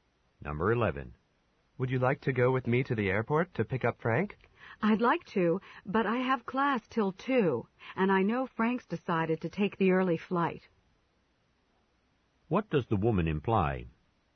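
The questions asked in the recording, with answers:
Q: What does the woman imply?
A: She can't go because Frank arrives before her class ends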